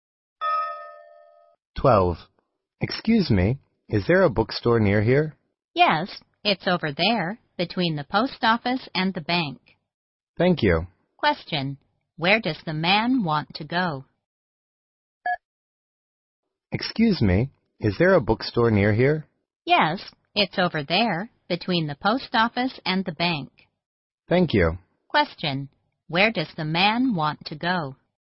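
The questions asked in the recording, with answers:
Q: Where does the man want to go?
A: A bookstore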